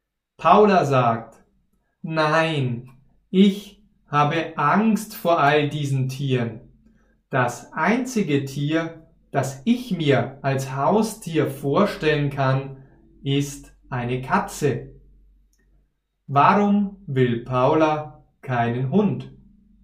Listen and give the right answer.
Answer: Weil sie Angst vor einem Hund hat.